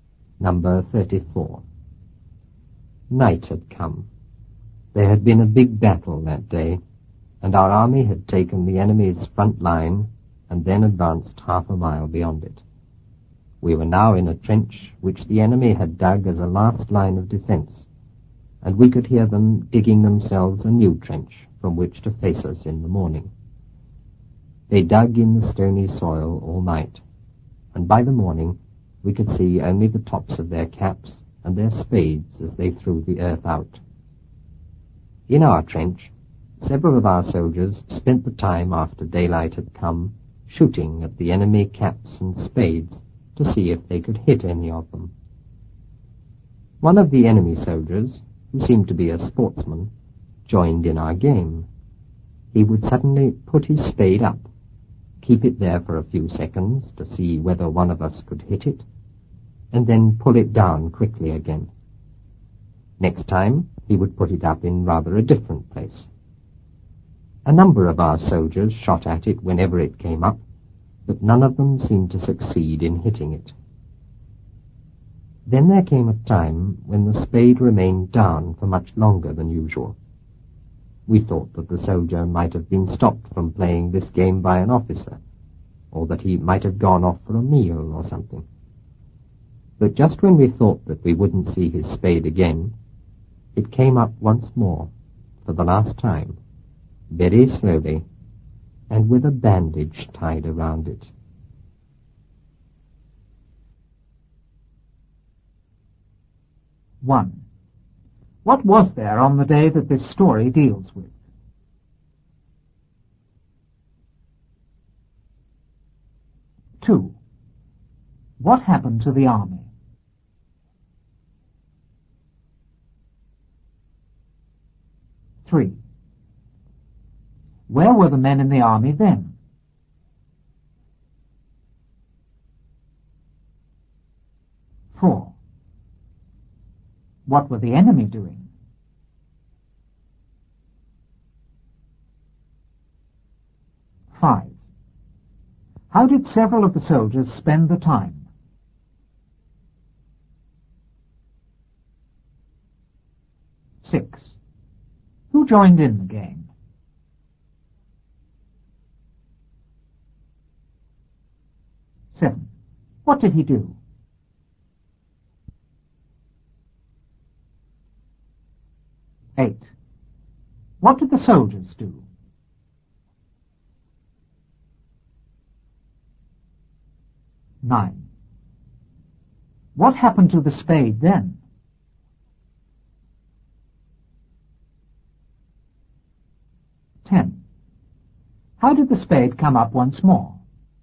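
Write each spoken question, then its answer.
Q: What was there on the day that this story deals with?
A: A big battle

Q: What happened to the army?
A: It took the enemy's front line and advanced half a mile beyond it

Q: Where were the men in the army then?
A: In a trench the enemy had dug as a last line of defense

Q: What were the enemy doing?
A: Digging themselves a new trench

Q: How did several of the soldiers spend the time?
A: Shooting at the enemy caps and spades

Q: Who joined in the game?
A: One of the enemy soldiers, a sportsman

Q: What did he do?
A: He put his spade up for a few seconds to see if they could hit it, then pulled it down

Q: What did the soldiers do?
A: They shot at it whenever it came up, but none hit it

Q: What happened to the spade then?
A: It stayed down much longer than usual

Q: How did the spade come up once more?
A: Very slowly, with a bandage tied around it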